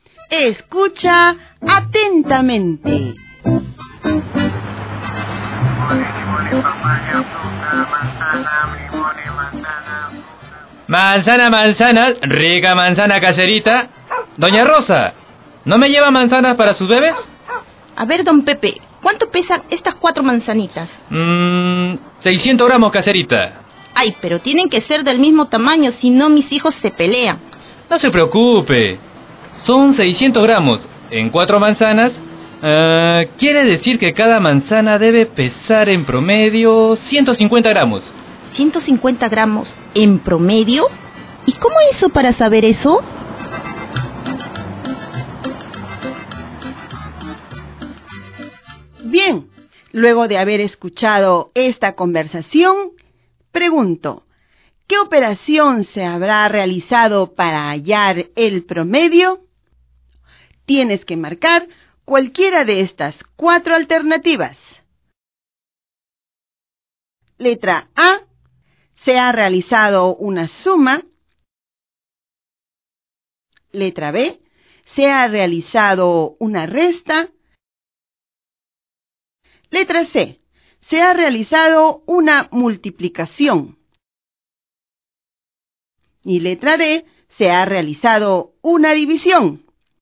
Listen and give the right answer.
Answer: Por lo tanto, debiste haber marcado la letra D.